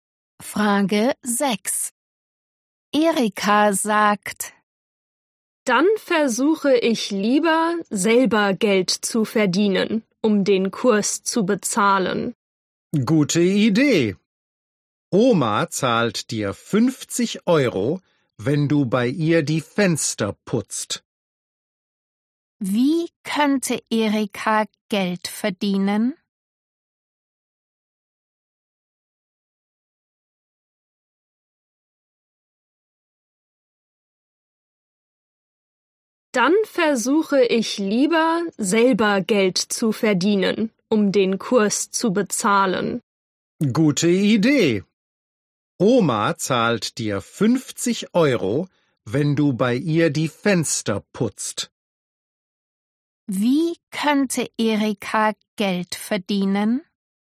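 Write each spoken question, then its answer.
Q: Wie könnte Erika Geld verdienen?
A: bei Oma die Fenster putzen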